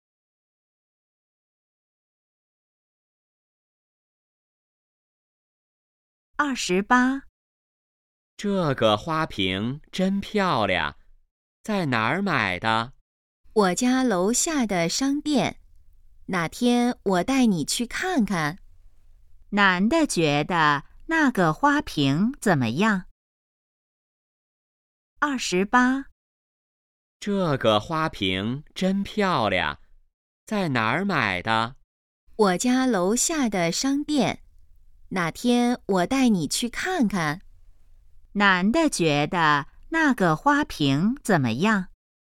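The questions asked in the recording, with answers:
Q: 男的觉得那个花瓶怎么样?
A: 很漂亮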